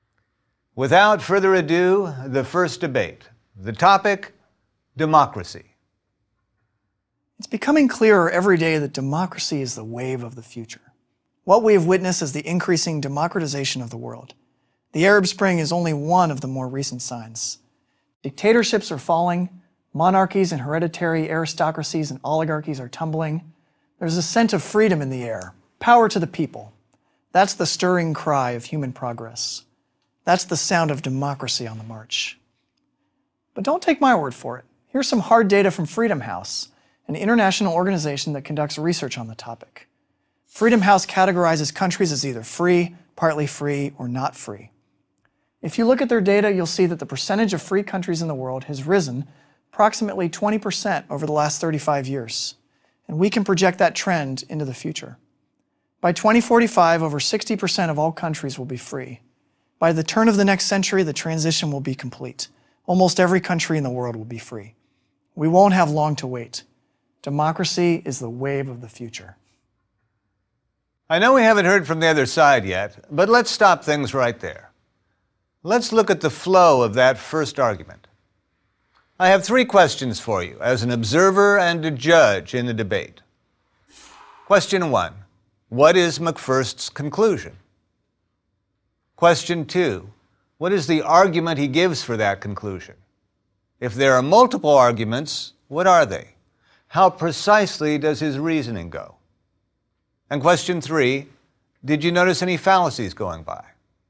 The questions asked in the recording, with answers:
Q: Question one, what is McFirst's conclusion?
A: what we have witnessed is the increasing democratization of the world.